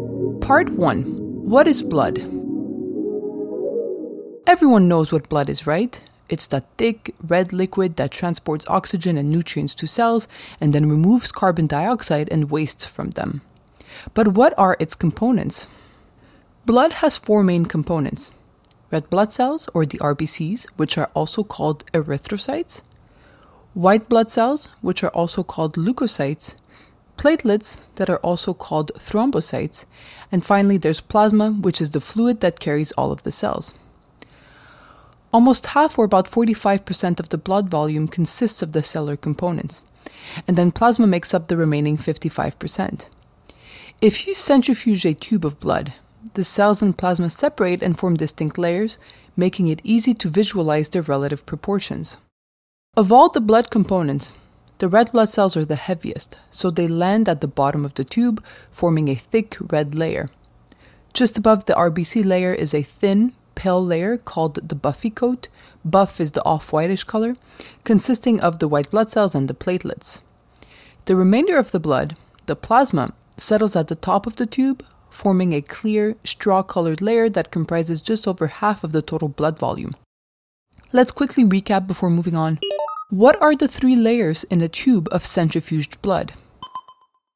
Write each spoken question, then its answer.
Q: What are the three layers in a tube of centrifuged blood?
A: There's the red blood cell layer at the bottom, then there's the buffy coat layer, which is composed of white blood cells and platelets in the middle, and finally there's the plasma layer at the top.